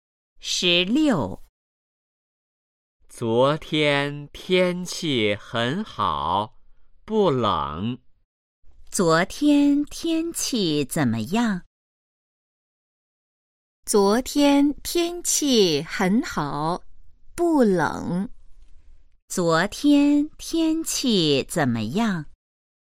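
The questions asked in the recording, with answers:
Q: 昨天天气怎么样?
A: 很好,不冷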